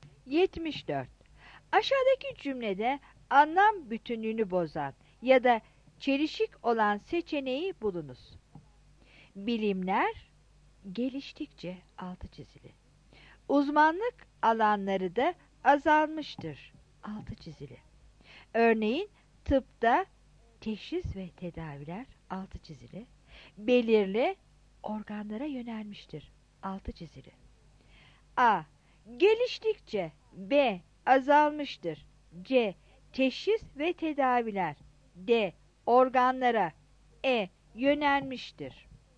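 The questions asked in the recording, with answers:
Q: Aşağıdaki cümlede anlam bütünlüğünü bozan ya da çelişik olan seçeneği bulunuz.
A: B: Azalmıştır.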